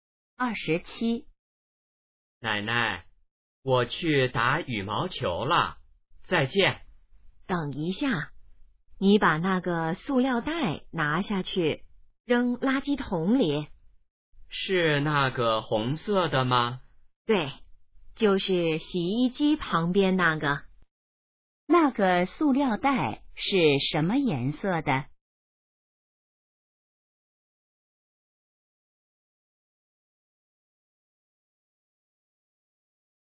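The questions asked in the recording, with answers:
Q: 那个塑料袋是什么颜色的?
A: 红色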